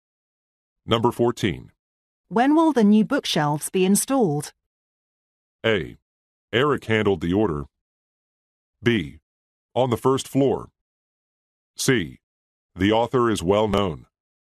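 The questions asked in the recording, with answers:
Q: When will the new bookshelves be installed?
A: A: Eric handled the order.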